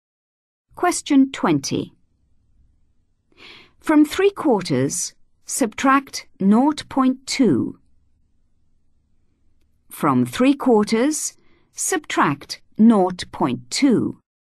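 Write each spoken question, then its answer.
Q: From 3/4, subtract 0.2.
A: 0.55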